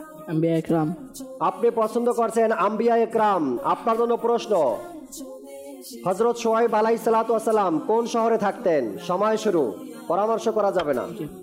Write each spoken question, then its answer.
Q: হযরত শোয়েব আলাইহিসসালাম কোন শহরে থাকতেন?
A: মাদিয়ান শহরে বসবাস করতেন।